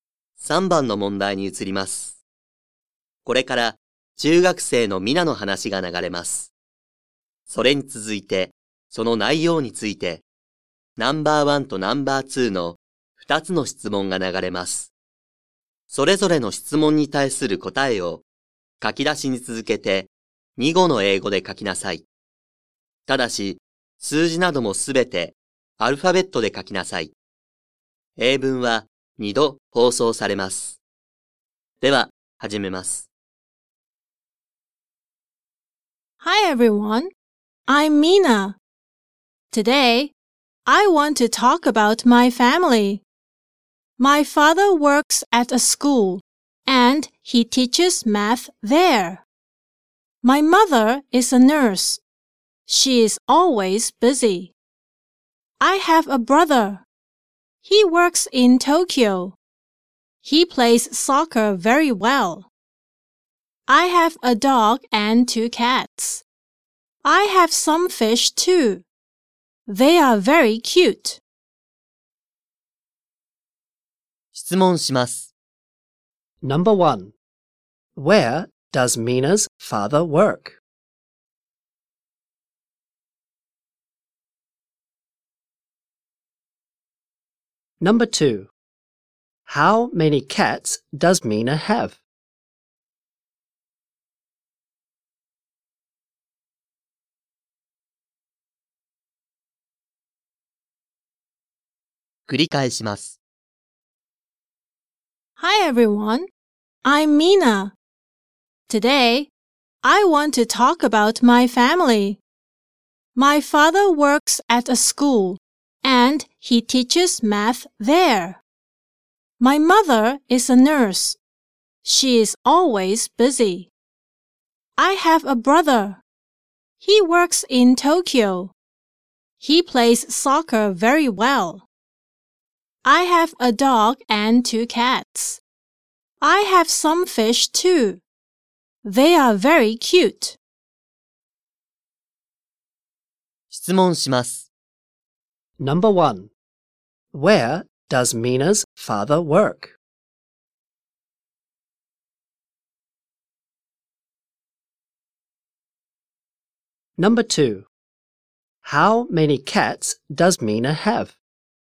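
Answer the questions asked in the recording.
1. At a school
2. Two cats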